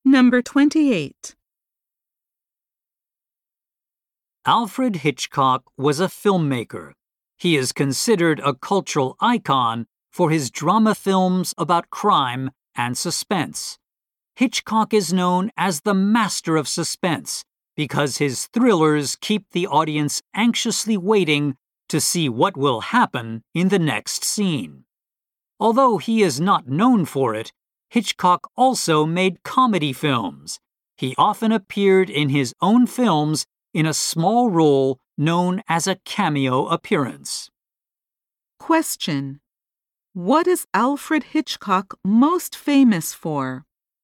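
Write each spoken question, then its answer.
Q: What is Alfred Hitchcock most famous for?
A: His suspense/crime drama films (master of suspense)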